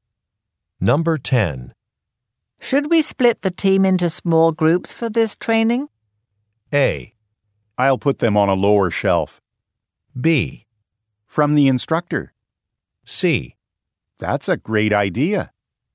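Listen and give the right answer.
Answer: C: That's a great idea.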